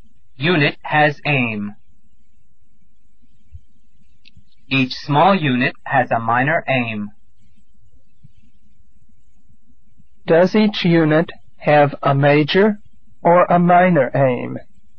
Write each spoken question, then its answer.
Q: Does each unit have a major or a minor aim?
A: A minor aim. It has a minor aim.